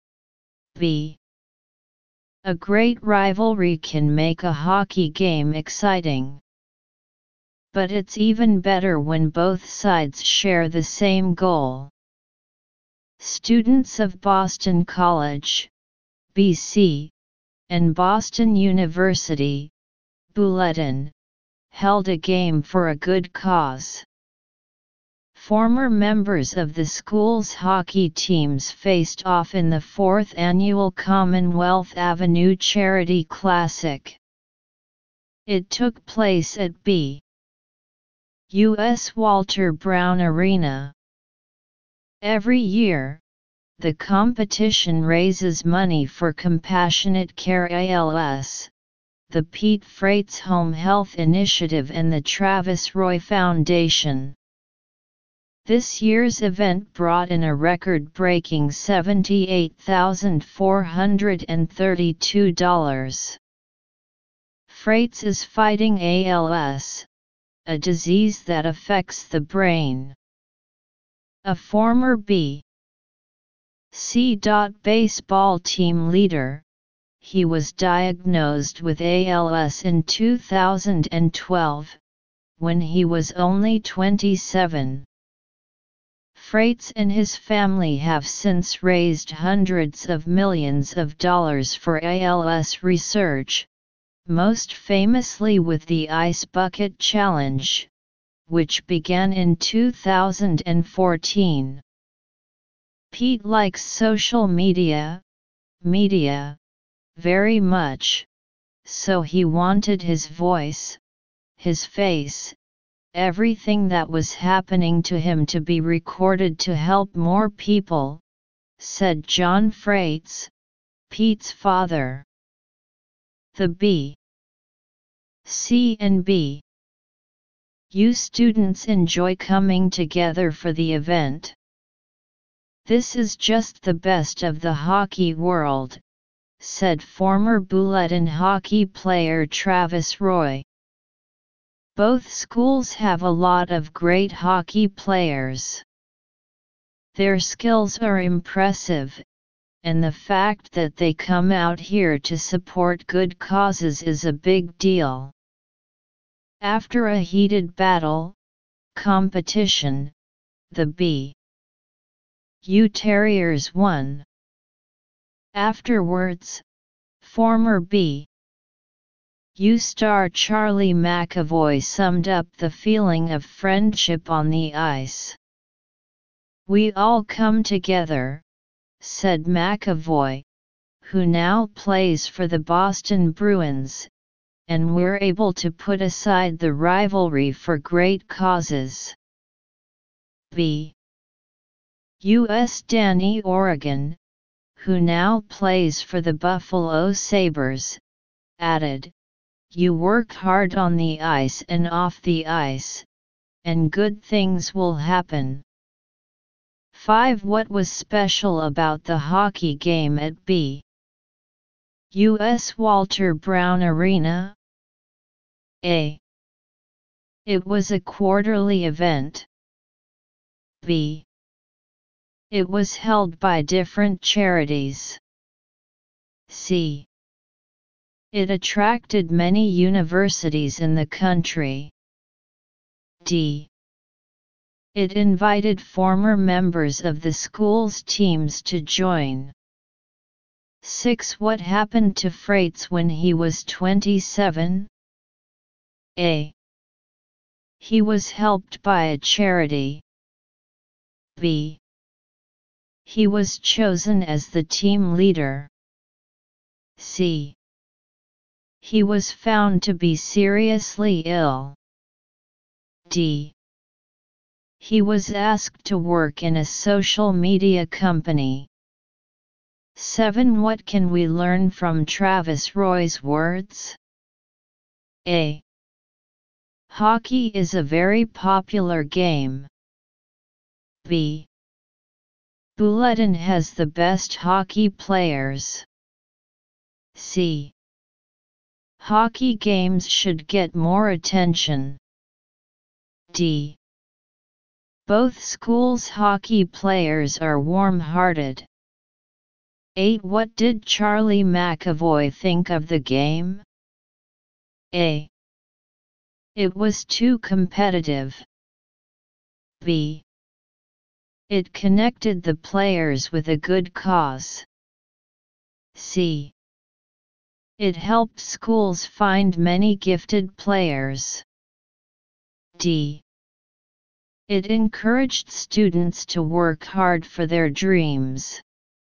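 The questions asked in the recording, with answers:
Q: What was special about the hockey game at BUS Walter Brown Arena?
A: D: It invited former members of the school's teams to join.

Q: What happened to Freitz when he was 27?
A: C: He was found to be seriously ill.

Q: What can we learn from Travis Roy's words?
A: D: Both schools' hockey players are warm-hearted.

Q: What did Charlie McAvoy think of the game?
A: B: It connected the players with a good cause.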